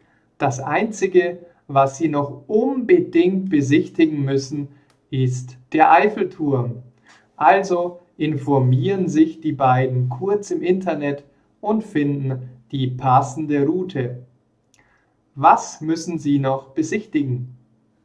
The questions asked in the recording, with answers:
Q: Was müssen Sie noch besichtigen?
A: Den Eiffelturm. Sie müssen noch den Eiffelturm besichtigen.